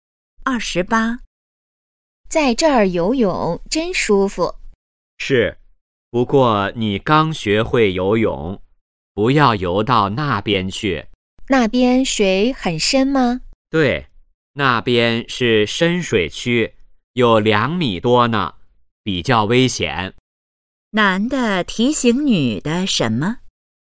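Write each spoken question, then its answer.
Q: 男的提醒女的什么?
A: 不要游到深水区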